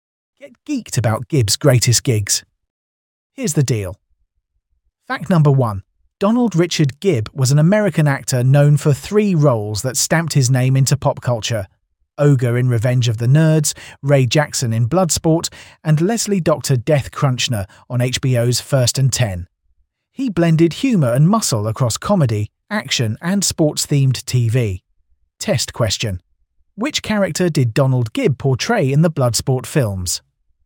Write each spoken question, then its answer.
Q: Which character did Donald Gibb portray in the Bloodsport films?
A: Correct answer. Ray Jackson.